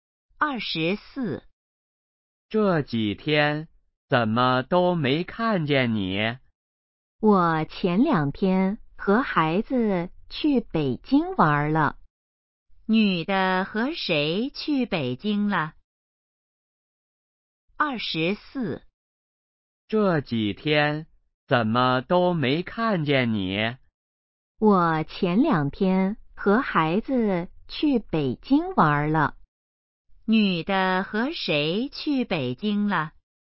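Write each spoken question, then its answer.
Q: 女的和谁去北京了?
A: 和孩子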